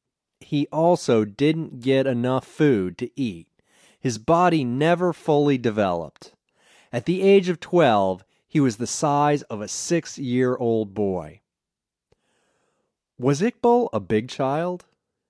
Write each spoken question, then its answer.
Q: Was Iqbal a big child?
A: No, he was very small. At the age of 12, he was the size of a 6-year-old boy.